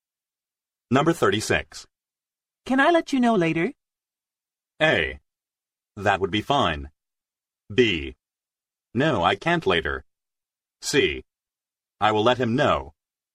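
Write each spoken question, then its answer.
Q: Can I let you know later?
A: A: That would be fine.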